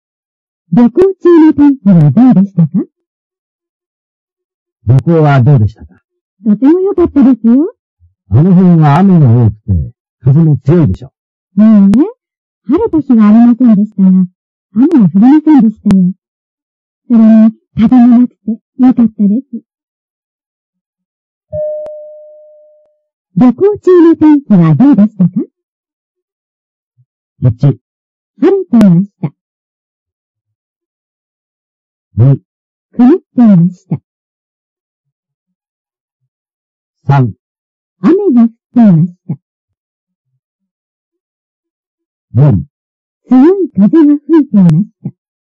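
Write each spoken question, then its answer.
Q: 旅行中の天気はどうでしたか?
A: 2: 曇っていました。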